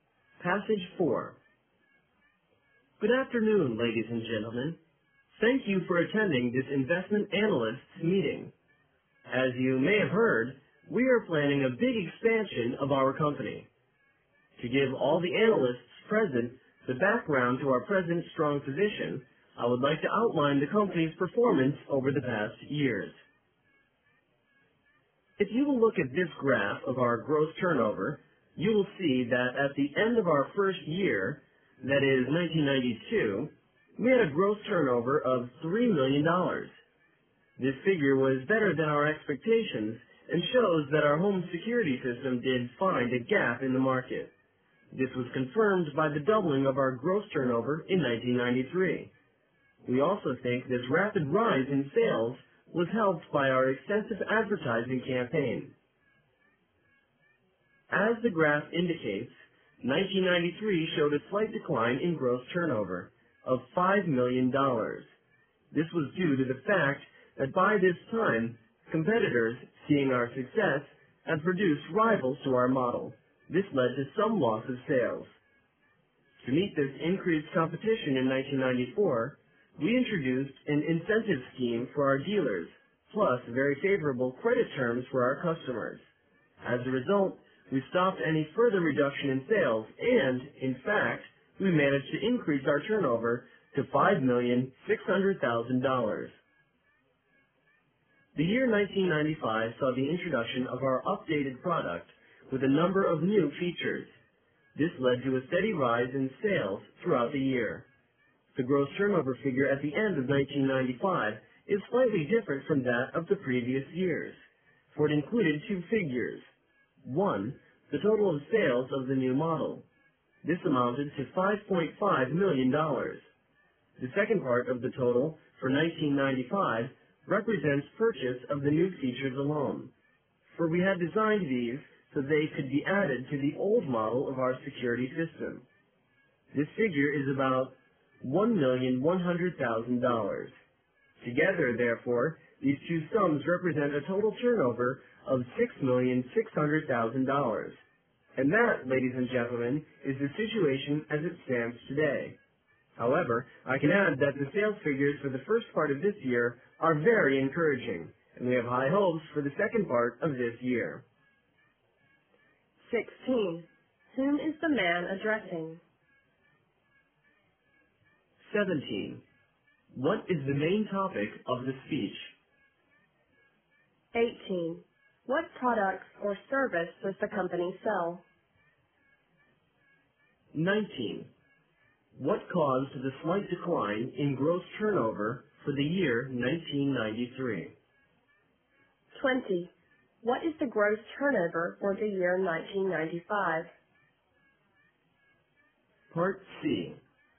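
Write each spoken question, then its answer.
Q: Whom is the man addressing?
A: Investment analysts

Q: What is the main topic of the speech?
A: The company's performance over the past years

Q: What products or service does the company sell?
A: Home security systems

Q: What caused the slight decline in gross turnover for the year 1993?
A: Competitors produced rival models

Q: What is the gross turnover for the year 1995?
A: $6,600,000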